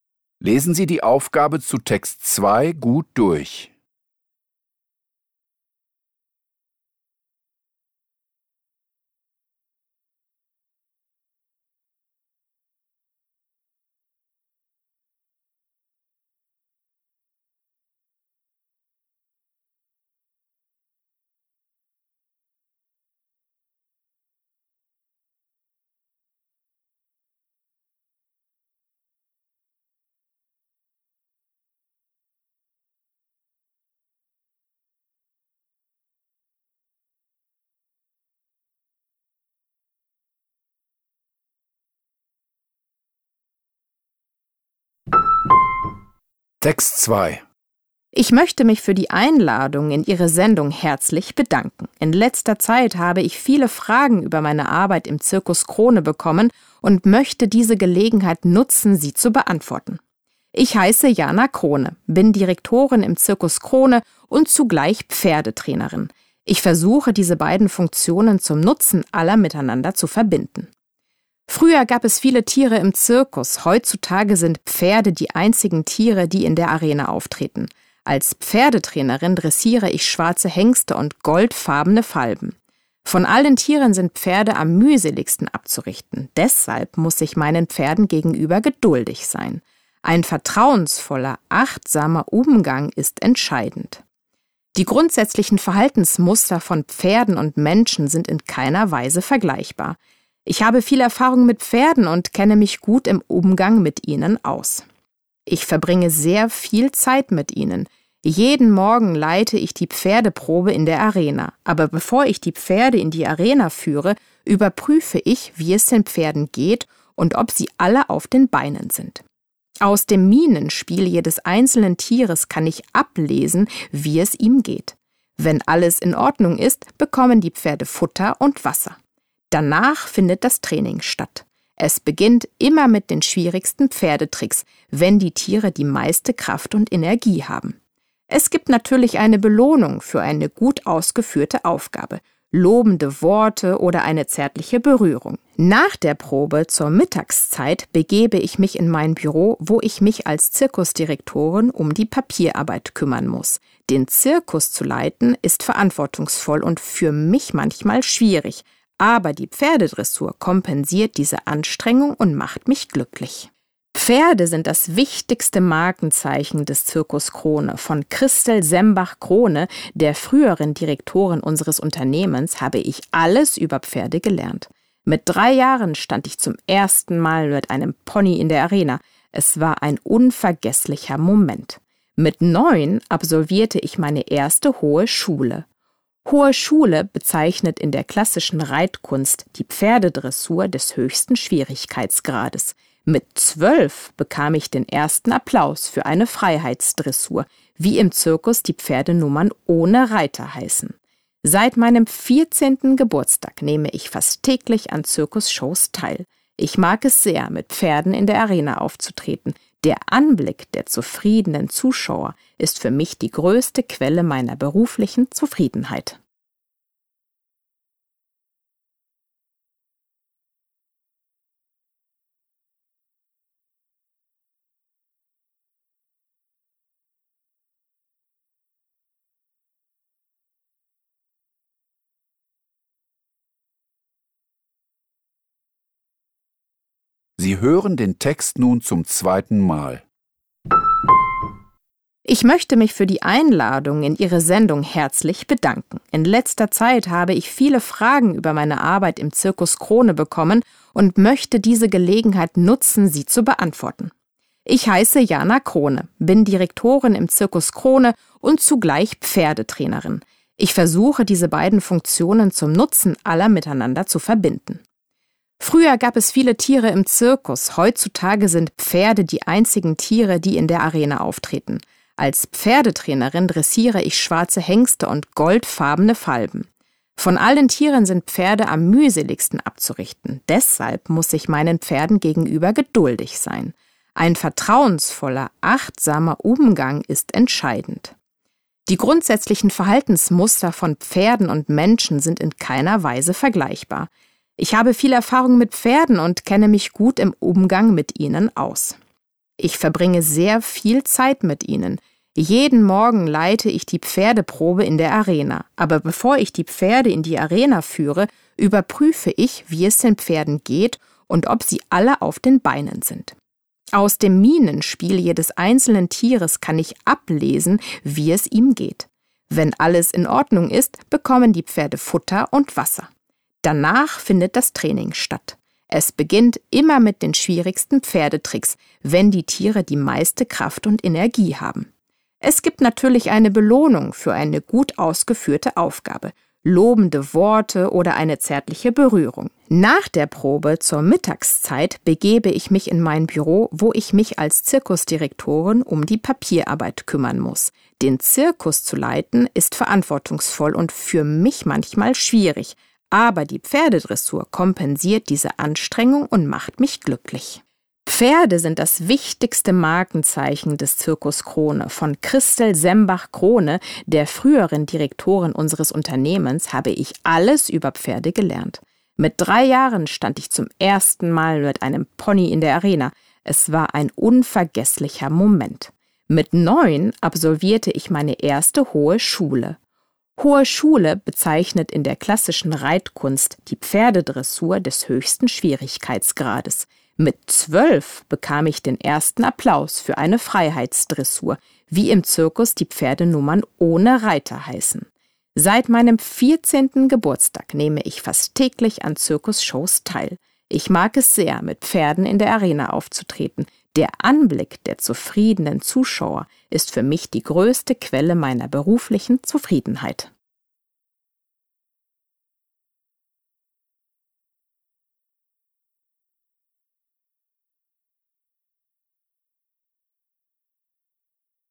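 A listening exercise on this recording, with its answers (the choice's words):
Hören Sie die folgenden zwei Texte, über Entwicklungszusammenarbeit und über Pferde im Zirkus, zweimal. Kreuzen Sie die jeweils richtige Antwort (A, B, C oder D) an. Nur jeweils eine Antwort ist richtig. Die Aufgaben 2.1–2.3 betreffen den ersten Text, die Aufgaben 2.4–2.6 den zweiten Text.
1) Was sagt Jana Krone über Pferde im Zirkus?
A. Pferde sind gehorsam und lassen sich mühelos trainieren.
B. Pferde brauchen viel Zuwendung und Aufmerksamkeit.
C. Pferde haben gleichartige Verhaltensmuster wie Menschen.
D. Pferde nehmen neben anderen Tieren an Zirkusvorstellungen teil.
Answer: Pferde brauchen viel Zuwendung und Aufmerksamkeit.

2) Welche dieser Tätigkeiten führt Jana jeden Morgen als letzte aus?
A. Sie füttert und tränkt die Pferde.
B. Sie kontrolliert, ob die Pferde gesund sind.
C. Sie führt die Pferde zur Probe in die Arena.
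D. Sie übt mit den Pferden die schwierigsten Nummern.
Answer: Sie übt mit den Pferden die schwierigsten Nummern.

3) Wann begann Jana Krone regelmäßig im Zirkus aufzutreten?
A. Als Jugendliche im Alter von 14 Jahren.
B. Schon als dreijähriges Kind mit einem Pony.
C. Seit sie als Neunjährige die Hohe Schule ritt.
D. Mit zwölf Jahren nach ihrem ersten Publikumserfolg.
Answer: Als Jugendliche im Alter von 14 Jahren.

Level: Poziom: dwujęzyczny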